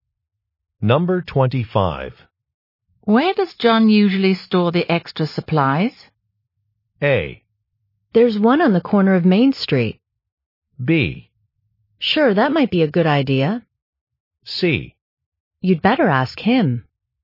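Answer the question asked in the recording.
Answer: C: You'd better ask him.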